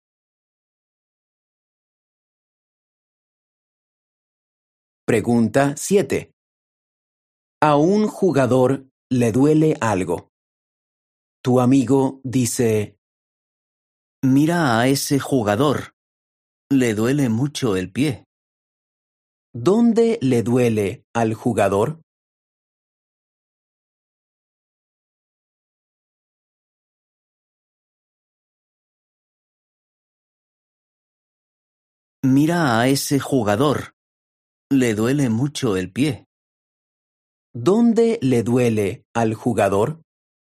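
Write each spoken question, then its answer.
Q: ¿Dónde le duele al jugador?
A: En el pie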